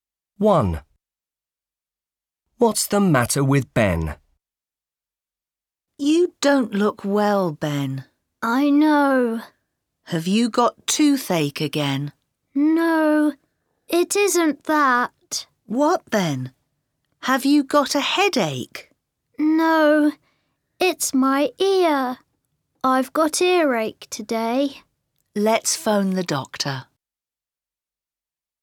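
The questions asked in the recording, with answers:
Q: What's the matter with Ben?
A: He has got earache.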